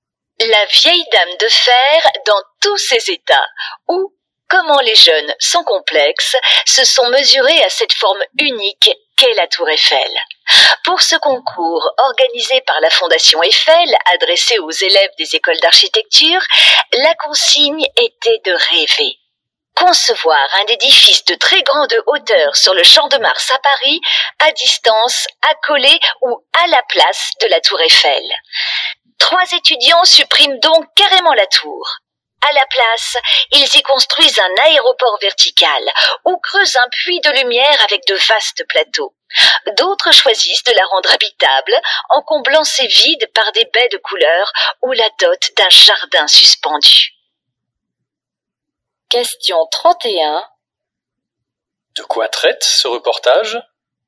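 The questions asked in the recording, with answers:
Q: De quoi traite ce reportage ?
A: D'un concours de la Fondation Eiffel où des étudiants en architecture imaginent un édifice de très grande hauteur sur le Champ de Mars, à côté ou à la place de la tour Eiffel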